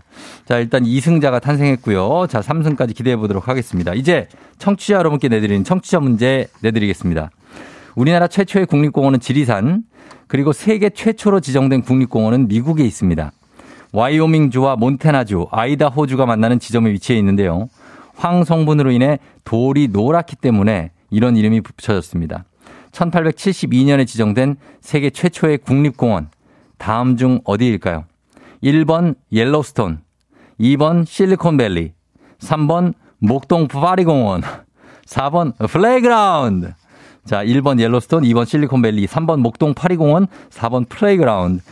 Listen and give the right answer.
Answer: 정답은 바로 두구두구두구두구두구 1번 옐로스톤이죠.